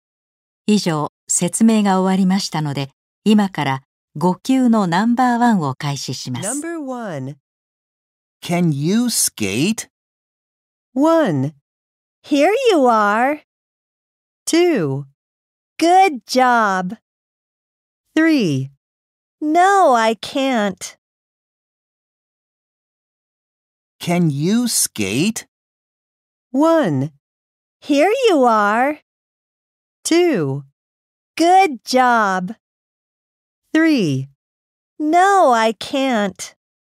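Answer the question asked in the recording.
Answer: 3: No, I can't.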